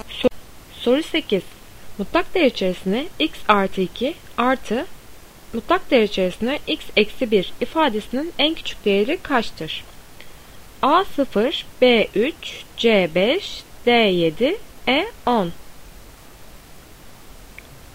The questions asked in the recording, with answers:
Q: Mutlak değer içerisinde x artı 2 artı mutlak değer içerisinde x eksi 1 ifadesinin en küçük değeri kaçtır?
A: Doğru cevap B 3.